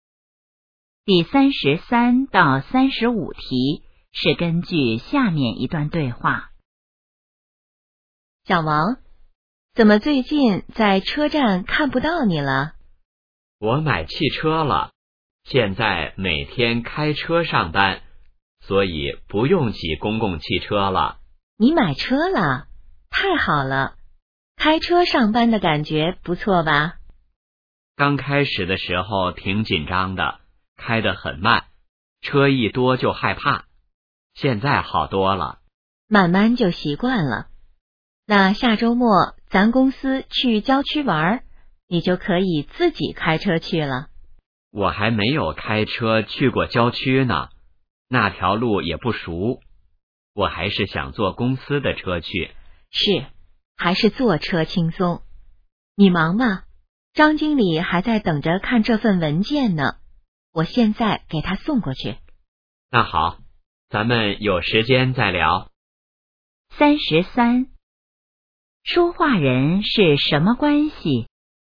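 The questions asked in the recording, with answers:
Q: 说话人是什么关系?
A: 同事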